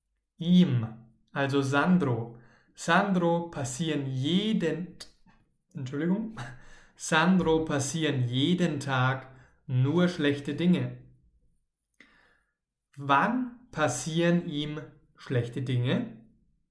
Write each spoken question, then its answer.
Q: Wann passieren ihm schlechte Dinge.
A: Jeden Tag, jeden Tag passieren ihm schlechte Dinge.